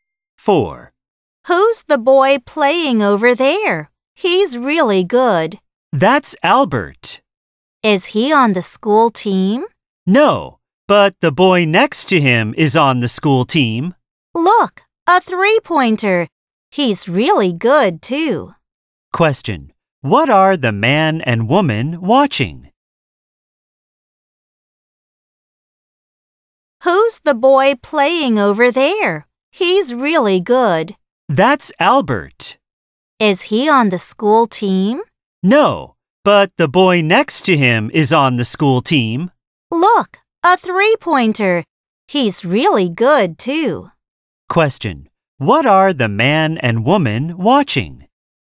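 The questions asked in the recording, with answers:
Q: What are the man and woman watching?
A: A basketball game.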